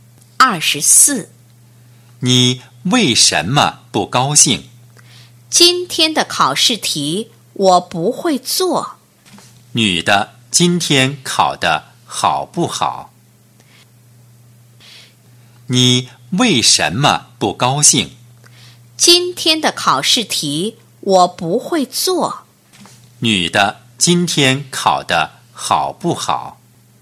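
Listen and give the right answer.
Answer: 不好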